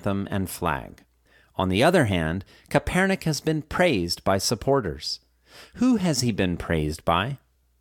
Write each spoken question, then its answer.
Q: Who has he been praised by?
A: He's been praised by supporters.